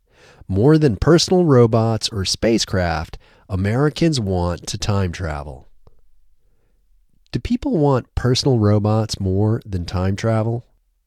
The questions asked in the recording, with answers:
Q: Do people want personal robots more than time travel?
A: No, they don't want personal robots more than time travel.